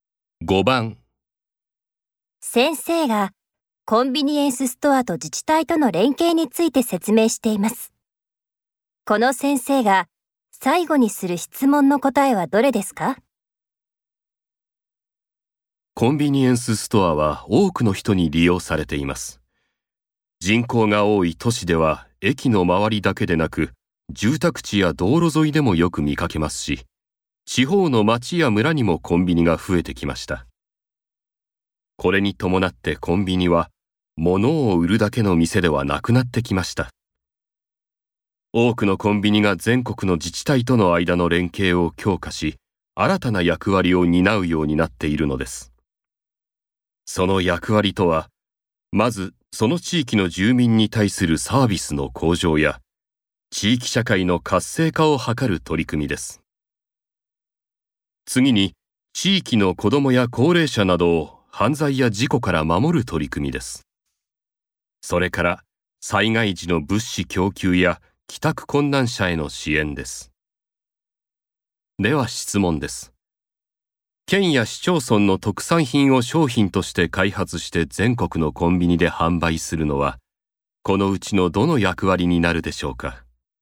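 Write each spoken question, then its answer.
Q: 県や市町村の特産品を商品として開発して全国のコンビニで販売するのは、このうちのどの役割になるでしょうか?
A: 地域住民へのサービス向上や地域社会の活性化を図る取り組み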